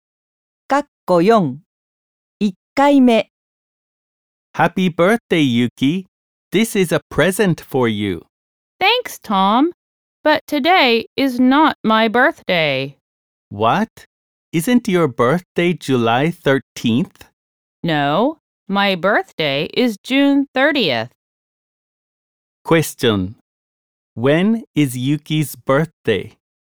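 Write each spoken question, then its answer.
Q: When is Yuki's birthday?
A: June 30th.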